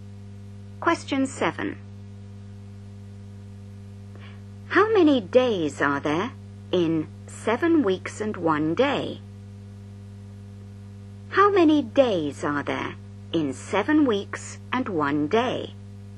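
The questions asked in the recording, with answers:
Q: How many days are there in 7 weeks and 1 day?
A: 50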